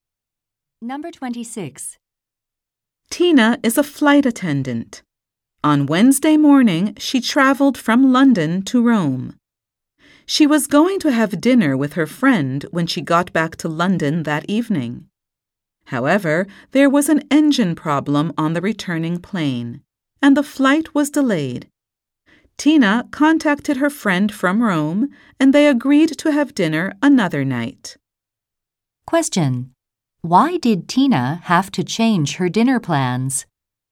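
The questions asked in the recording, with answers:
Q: Why did Tina have to change her dinner plans?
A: Her return flight was delayed by an engine problem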